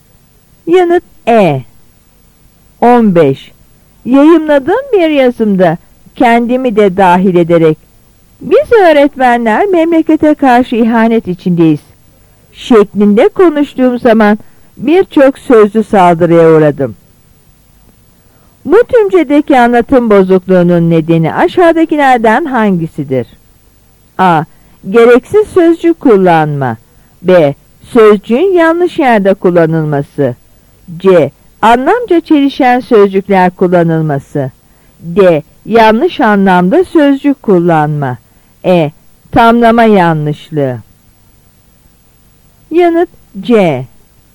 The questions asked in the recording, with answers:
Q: Bu tümcedeki anlatım bozukluğunun nedeni aşağıdakilerden hangisidir?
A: Yanıt C.